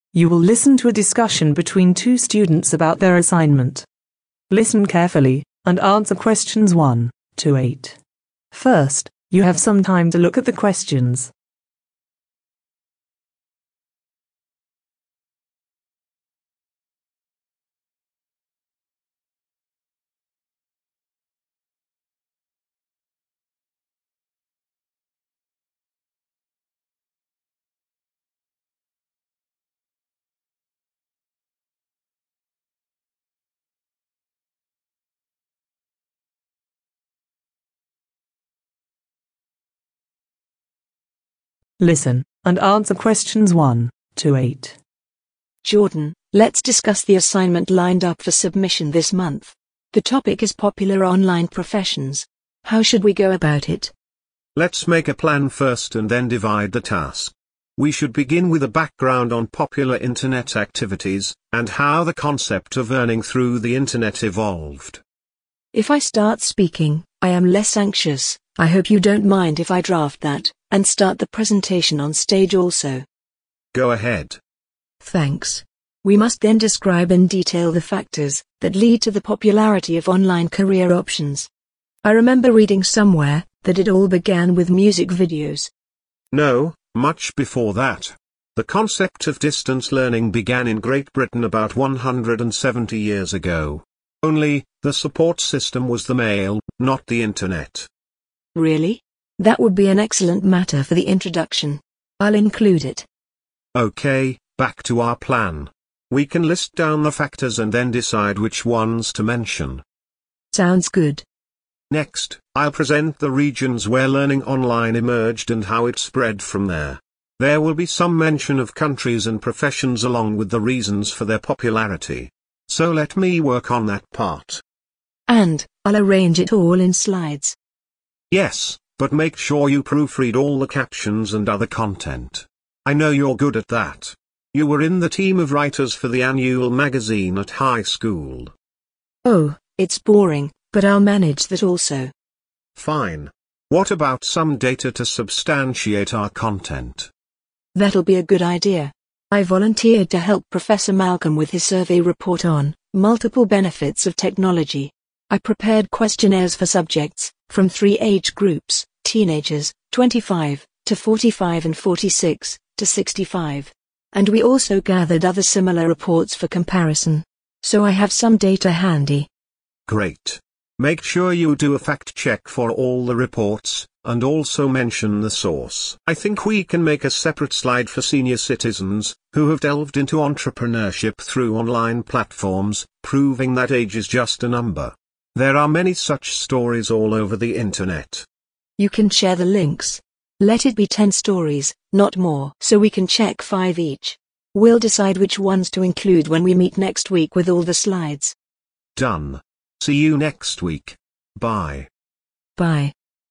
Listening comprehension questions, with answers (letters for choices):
Write the correct letter A, B or C, next to the questions 1-8.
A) Daisy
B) Jordan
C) Both Daisy and Jordan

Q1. Write the introduction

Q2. Begin the presentation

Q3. Selecting factors to be mentioned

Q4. Identify regions where online career emerged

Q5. Make the slides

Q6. Proofread the content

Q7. Collect statistical reports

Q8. Do a Fact-check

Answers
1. A
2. A
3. C
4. B
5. A
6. A
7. A
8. A